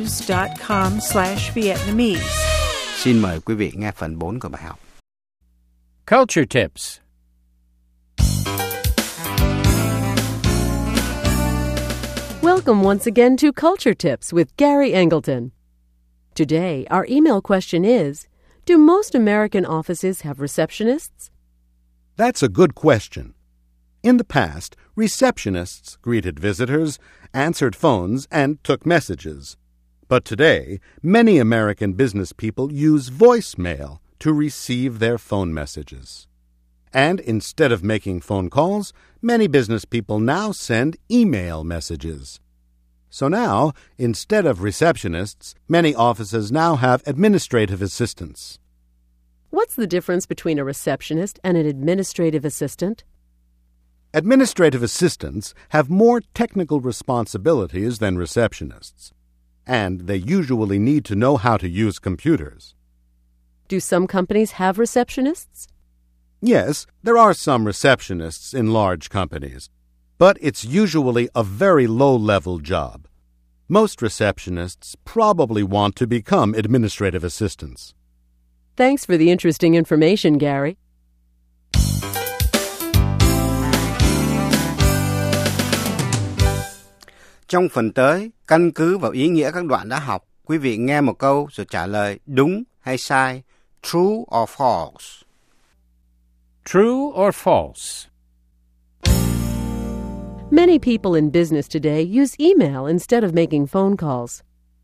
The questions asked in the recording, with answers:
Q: Many people in business today use email instead of making phone calls.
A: True. Email has become very popular in American business.